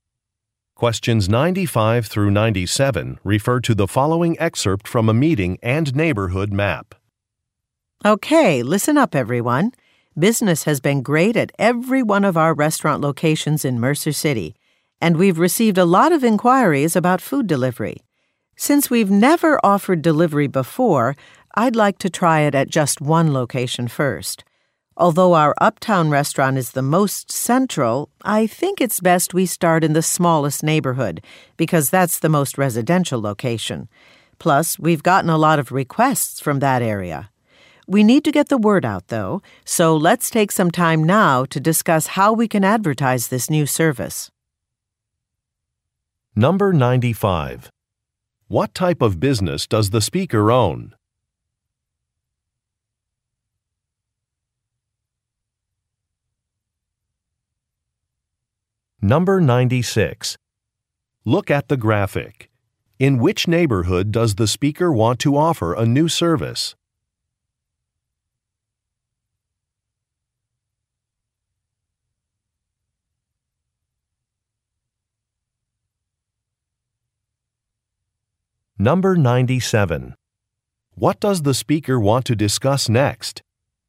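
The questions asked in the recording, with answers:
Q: What type of business does the speaker own?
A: Restaurants

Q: What does the speaker want to discuss next?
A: How to advertise the delivery service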